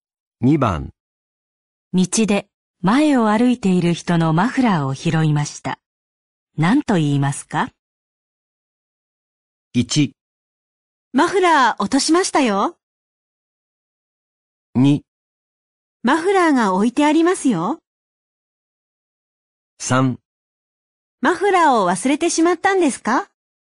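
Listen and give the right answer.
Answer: 1: マフラー落としましたよ。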